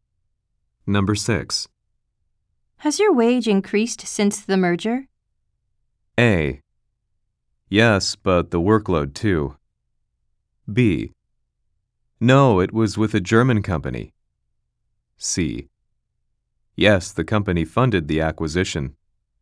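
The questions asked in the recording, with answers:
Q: Has your wage increased since the merger?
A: A: Yes, but the workload too.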